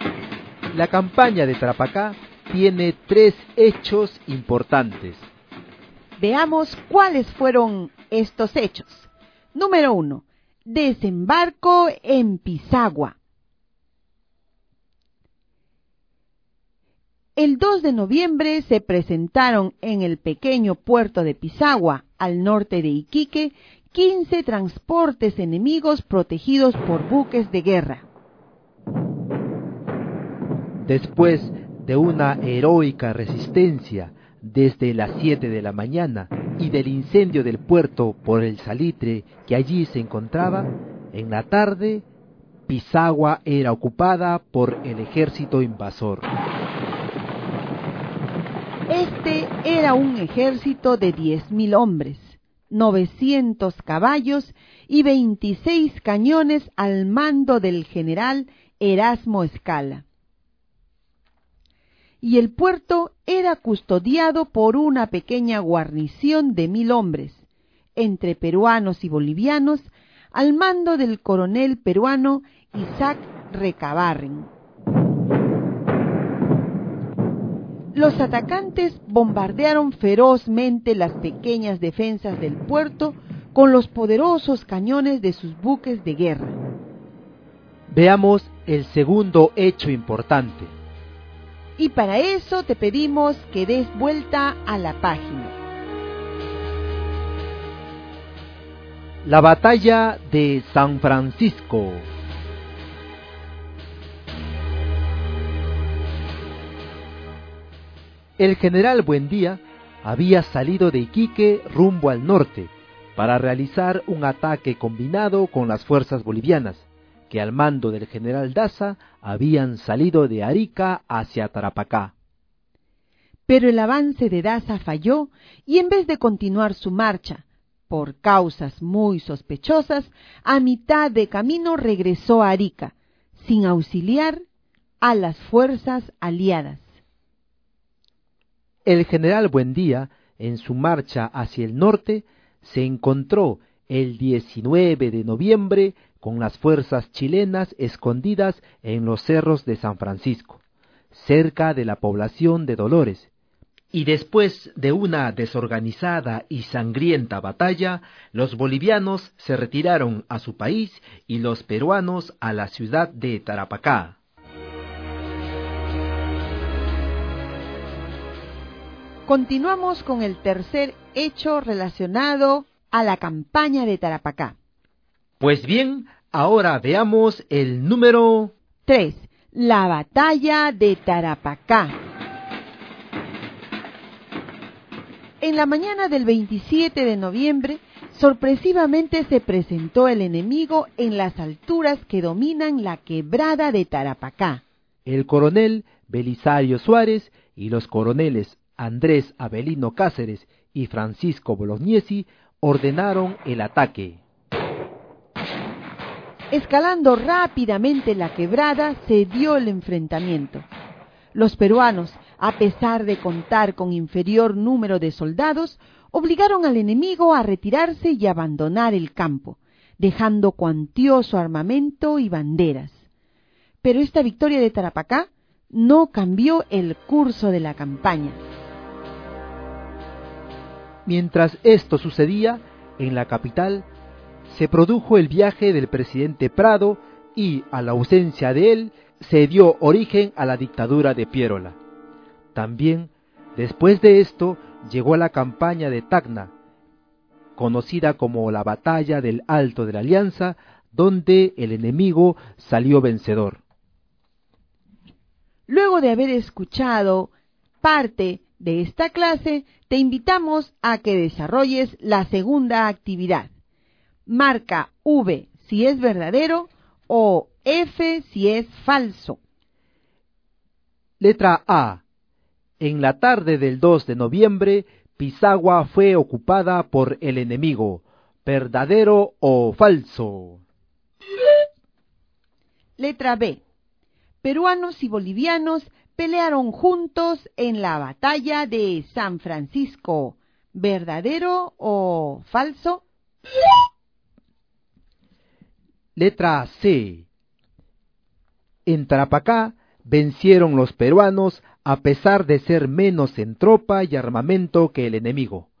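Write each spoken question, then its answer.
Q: Letra A. En la tarde del 2 de noviembre, Pisagua fue ocupada por el enemigo.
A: Verdadero

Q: Letra B. Peruanos y bolivianos pelearon juntos en la batalla de San Francisco.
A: Verdadero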